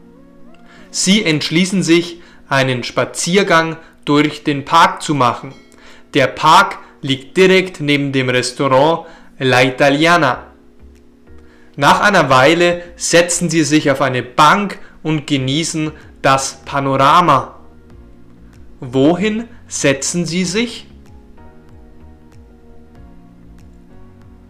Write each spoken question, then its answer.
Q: Wohin setzen sie sich?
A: Auf eine Bank. Sie setzen sich auf eine Bank.